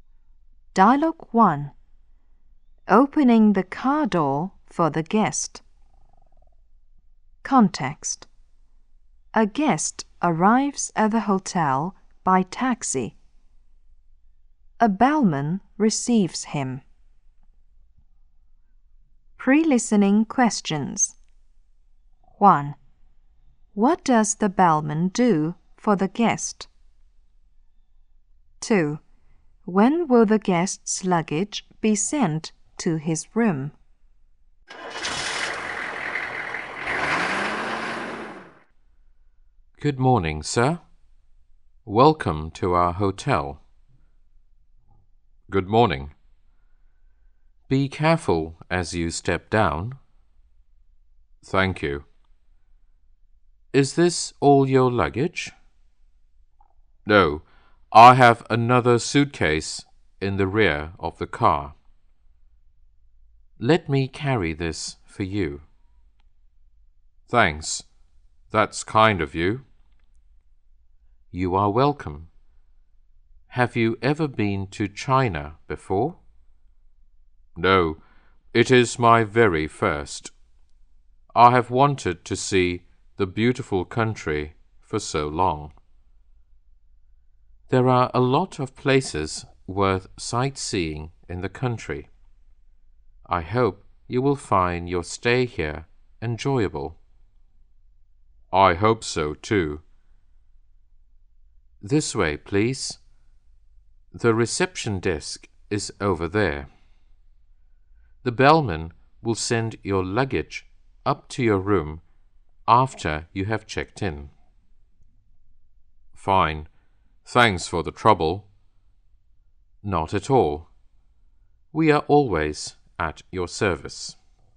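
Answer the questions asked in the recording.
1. He welcomes him, helps him step down and carries his luggage.
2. After he has checked in.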